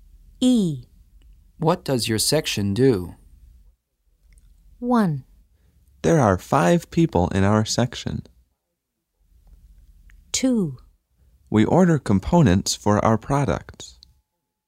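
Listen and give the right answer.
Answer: 2: We order components for our products.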